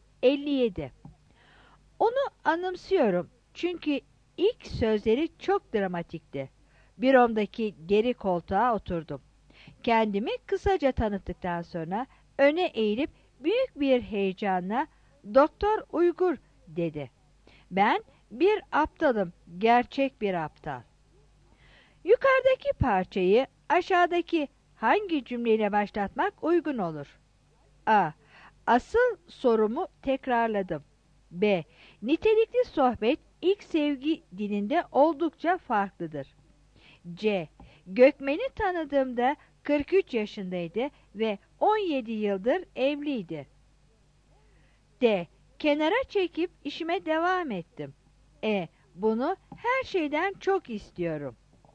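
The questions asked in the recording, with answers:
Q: Yukarıdaki parçayı aşağıdaki hangi cümleyle başlatmak uygun olur?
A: C: Gökmen'i tanıdığımda 43 yaşındaydı ve 17 yıldır evliydi.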